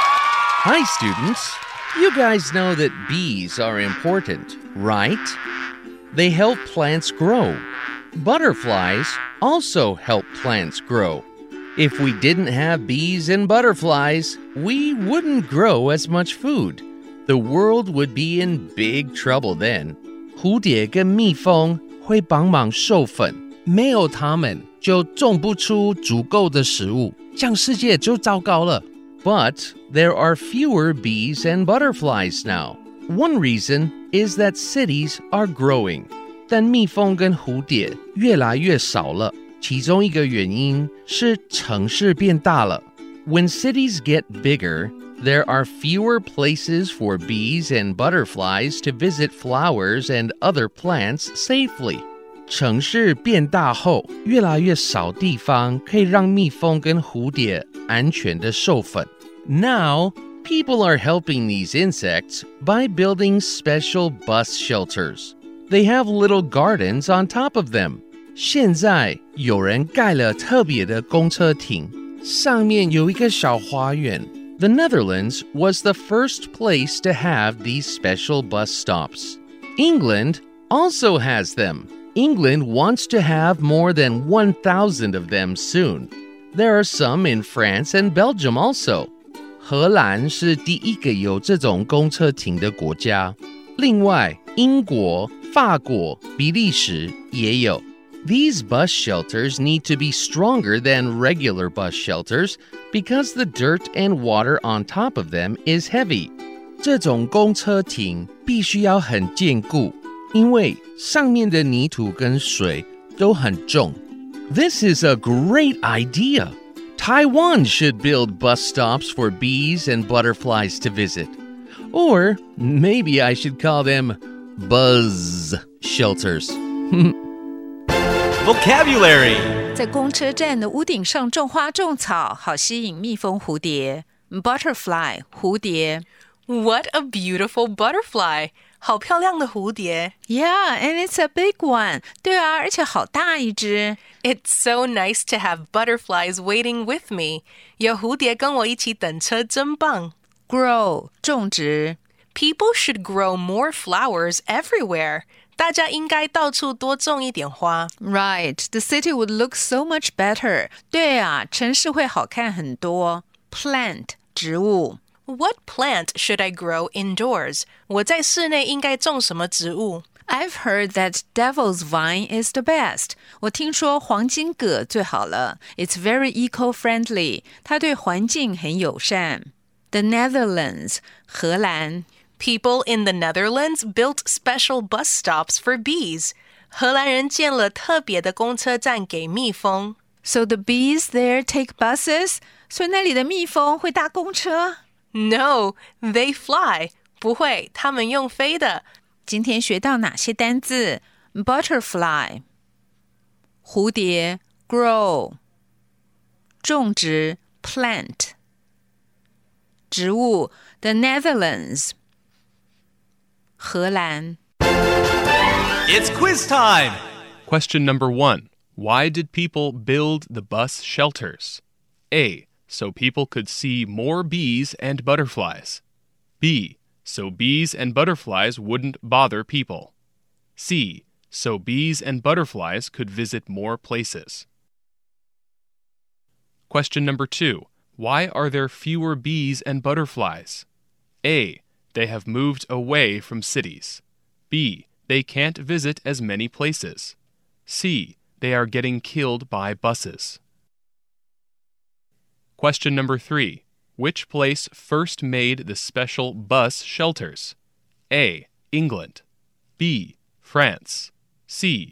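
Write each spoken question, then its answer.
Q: Why did people build the bus shelters?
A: C: So bees and butterflies could visit more places.

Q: Why are there fewer bees and butterflies?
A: B: They can't visit as many places.

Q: Which place first made the special bus shelters?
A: C: The Netherlands.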